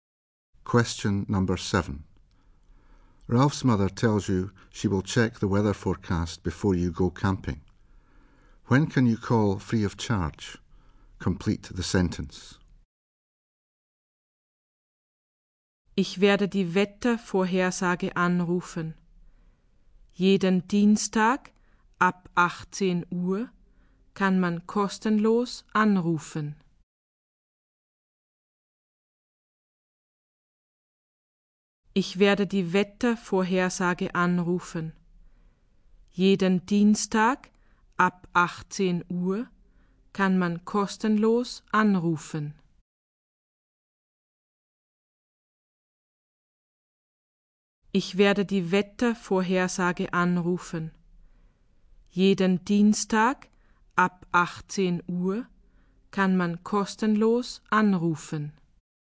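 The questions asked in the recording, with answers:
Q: When can you call free of charge?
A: Every Tuesday from 6 pm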